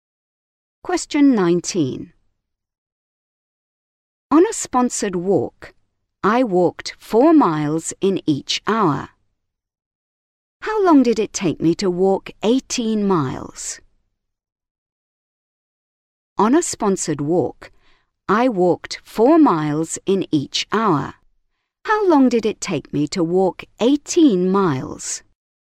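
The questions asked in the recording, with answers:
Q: How long did it take me to walk 18 miles?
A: 4.5 hours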